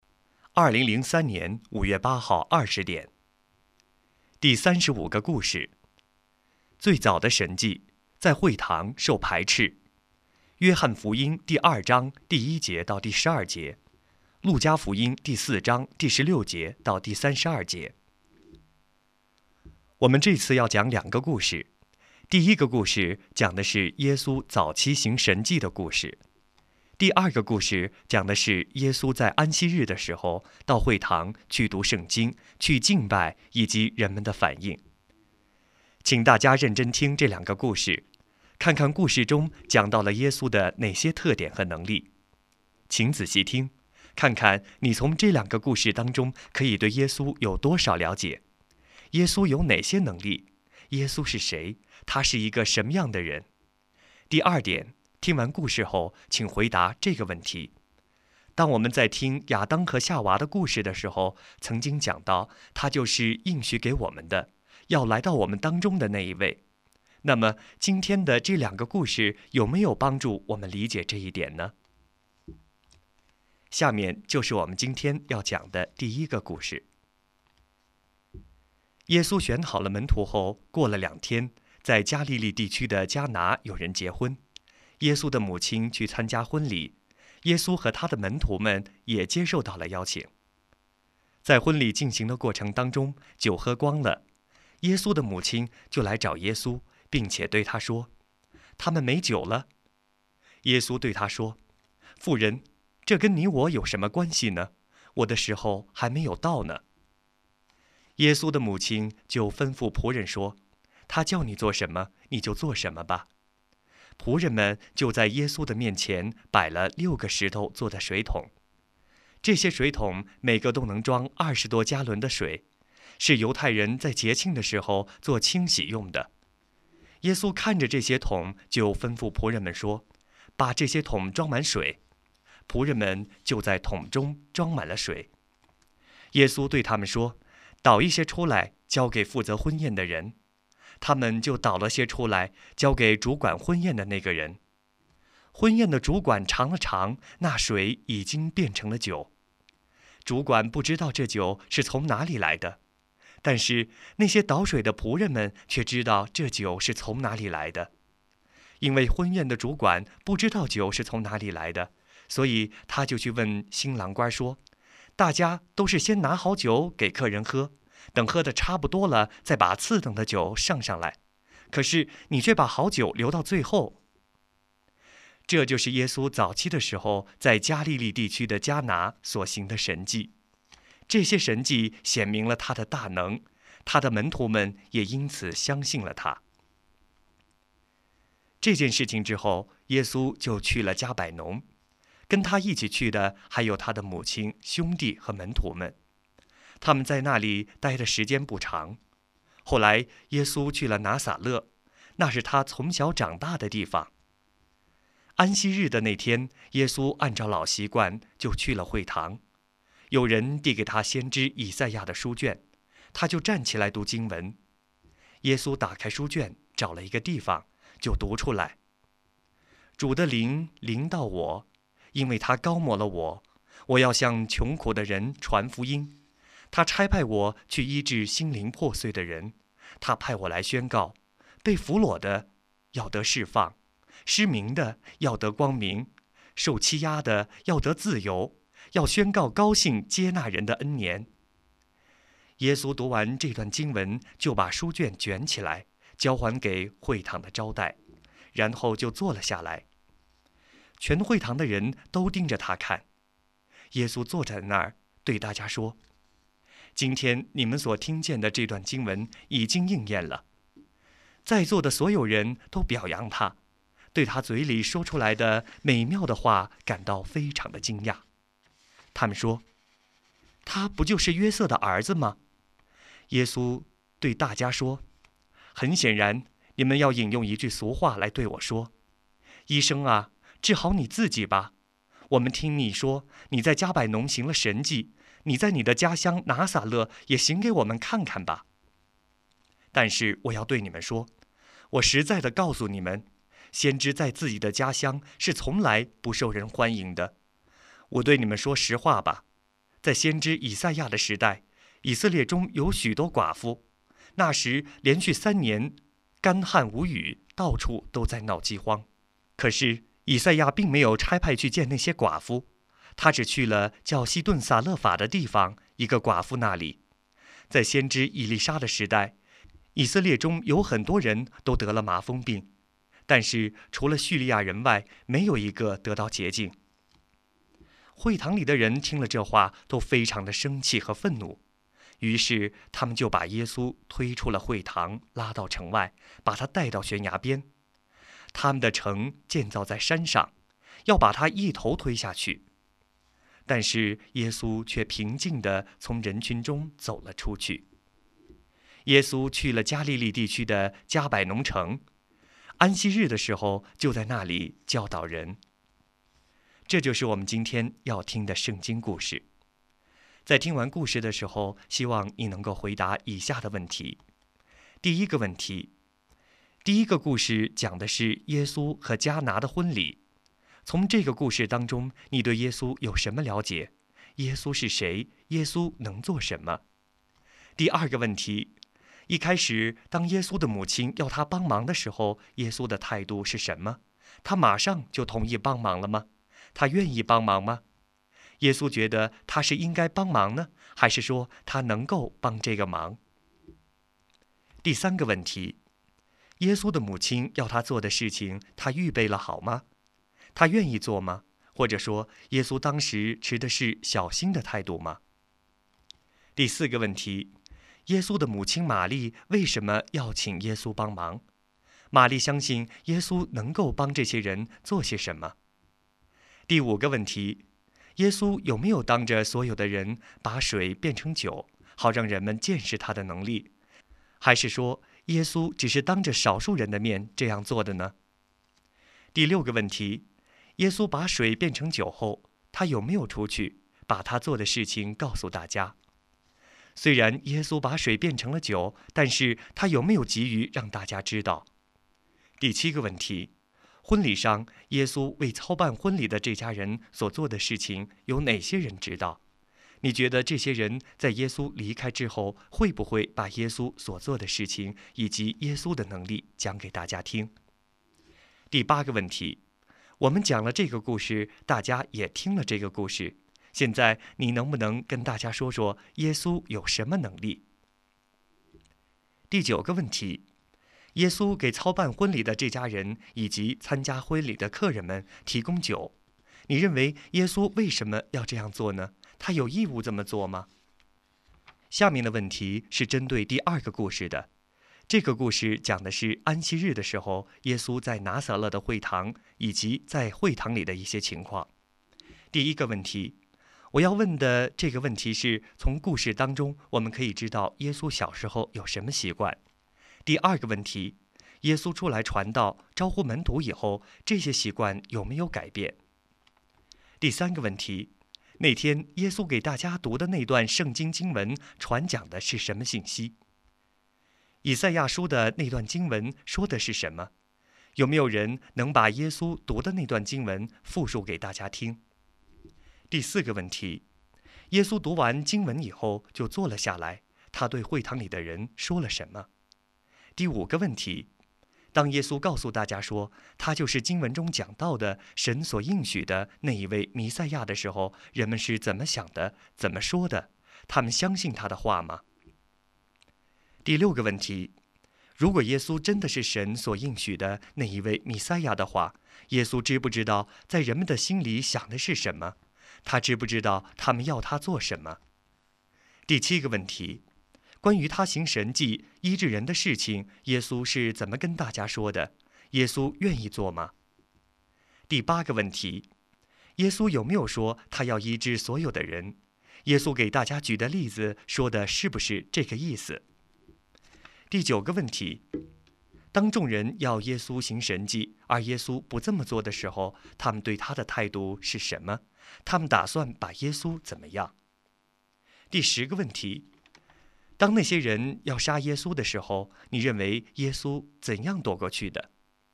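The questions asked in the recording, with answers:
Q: 耶稣有没有当着所有的人把水变成酒,好让人们见识他的能力?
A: 没有,只有少数人(倒水的仆人)知道

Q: 婚礼上耶稣为操办婚礼的这家人所做的事情有哪些人知道?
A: 倒水的仆人们(还有门徒)

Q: 从故事当中我们可以知道耶稣小时候有什么习惯。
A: 安息日去会堂

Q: 耶稣读完经文以后就坐了下来,他对会堂里的人说了什么?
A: 今天你们所听见的这段经文已经应验了

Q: 当众人要耶稣行神迹,而耶稣不这么做的时候,他们对他的态度是什么?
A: 非常生气愤怒,要把他从悬崖推下去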